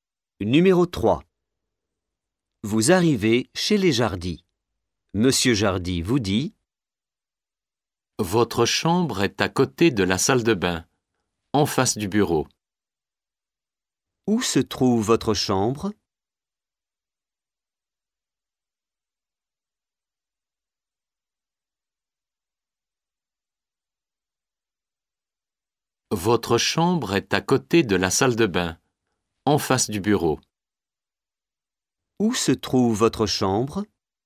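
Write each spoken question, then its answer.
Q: Où se trouve votre chambre ?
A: À côté de la salle de bain, en face du bureau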